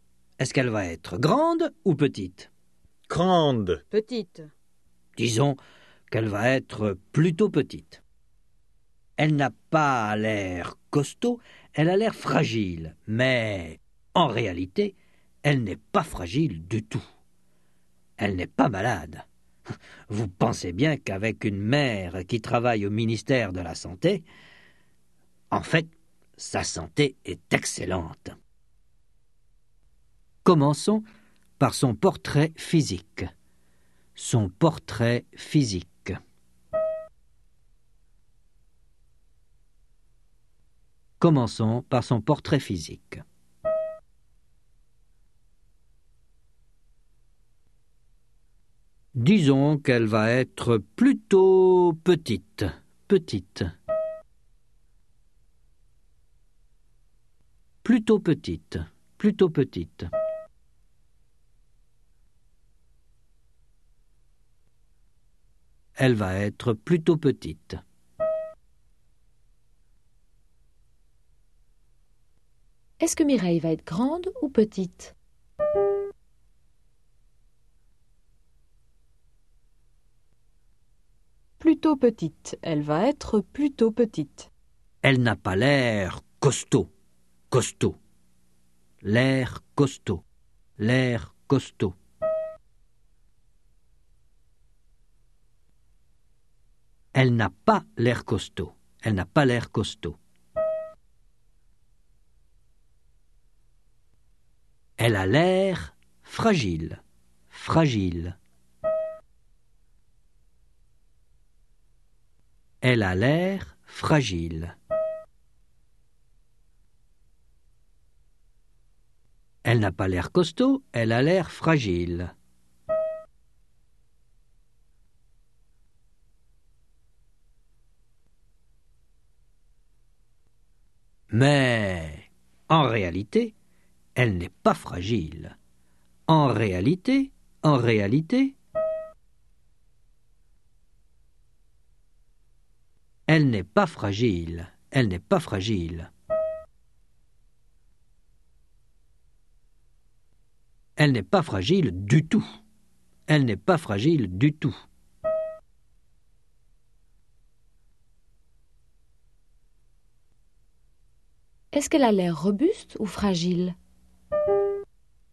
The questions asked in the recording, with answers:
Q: Est-ce qu'elle a l'air robuste ou fragile?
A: Fragile. Elle a l'air fragile.